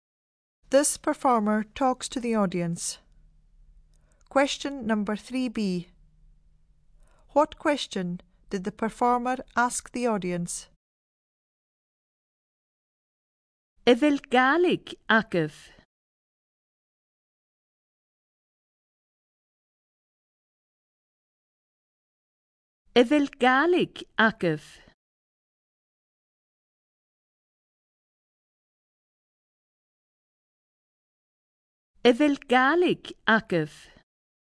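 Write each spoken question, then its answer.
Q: What question did the performer ask the audience?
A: Do you speak Gaelic?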